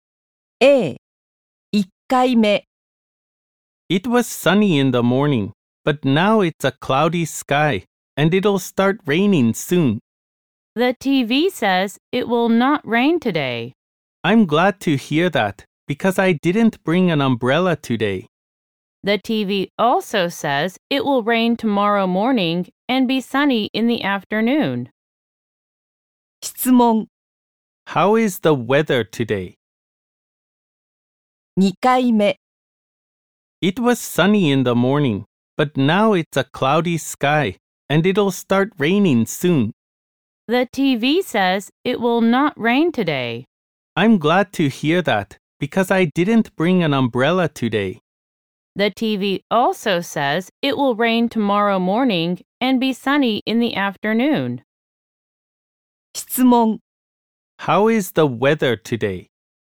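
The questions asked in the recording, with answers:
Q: How is the weather today?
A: Cloudy, but it will not rain.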